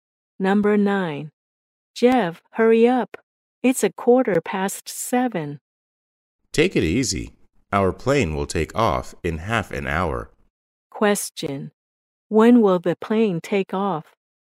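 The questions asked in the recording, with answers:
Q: When will the plane take off?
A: At a quarter to eight (7:45)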